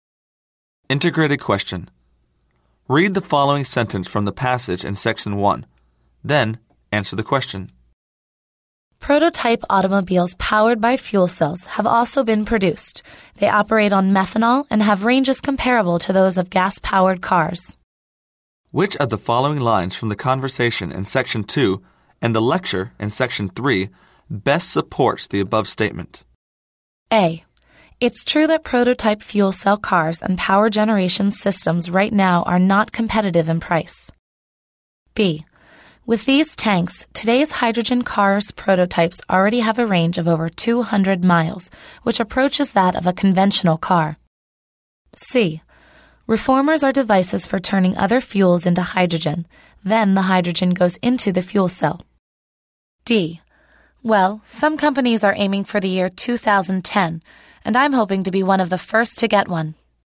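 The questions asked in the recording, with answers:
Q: Which of the following lines from the conversation in section 2 and the lecture in section 3 best supports the above statement?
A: B: With these tanks, today's hydrogen cars prototypes already have a range of over 200 miles, which approaches that of a conventional car.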